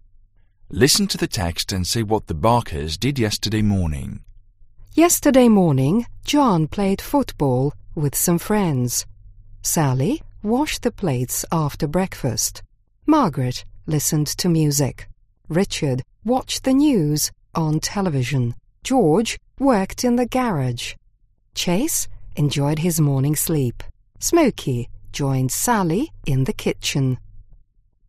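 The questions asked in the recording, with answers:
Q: Listen to the text and say what the Barkers did yesterday morning.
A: John played football with friends, Sally washed the plates, Margaret listened to music, Richard watched the news on TV, George worked in the garage, Chase enjoyed his morning sleep, Smokey joined Sally in the kitchen.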